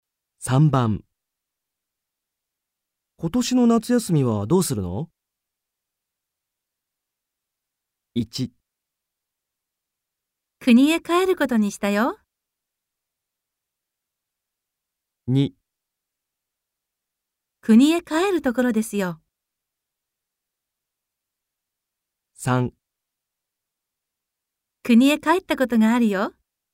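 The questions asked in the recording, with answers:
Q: 今年の夏休みはどうするの?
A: 1: 国へ帰ることにしたよ。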